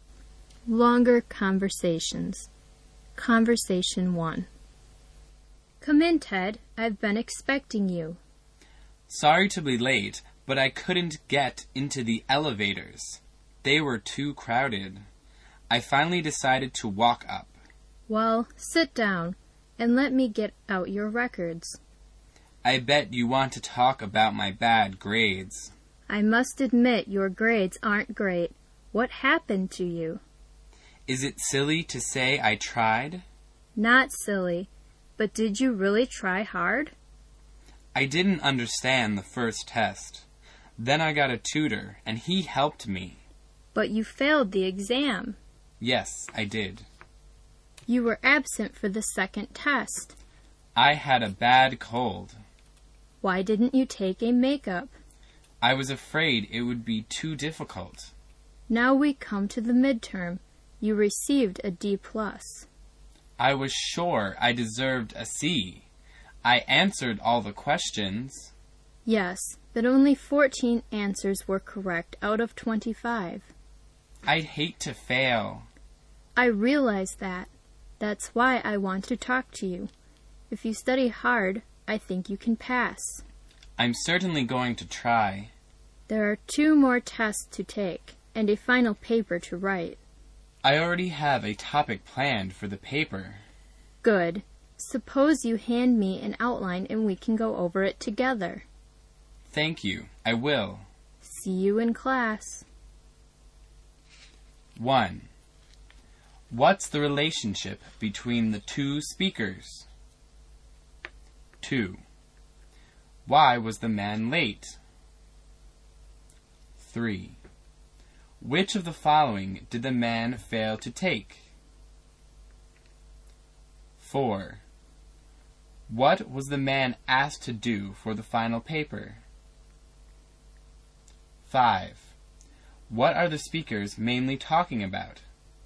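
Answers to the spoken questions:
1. Teacher and student
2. The elevators were too crowded, so he walked up
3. The second test
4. Hand in an outline
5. The man's bad grades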